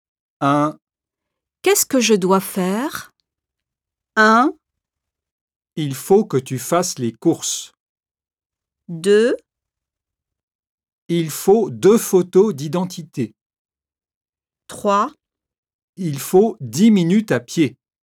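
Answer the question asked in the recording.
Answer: 1: Il faut que tu fasses les courses.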